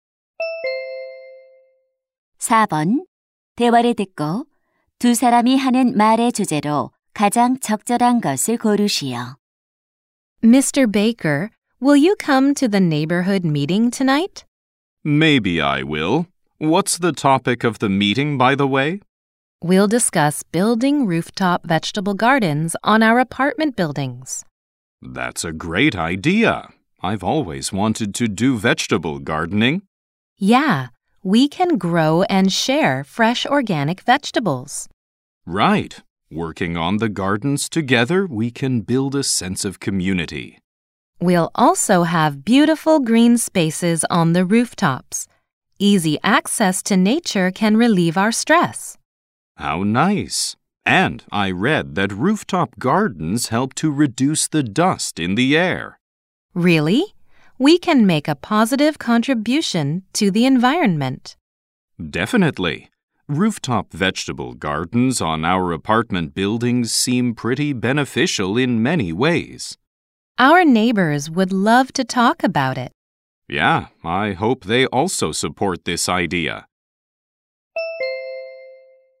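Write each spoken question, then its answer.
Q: 대화를 듣고 두 사람이 하는 말의 주제로 가장 적절한 것을 고르시오.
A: 아파트 옥상 텃밭의 이점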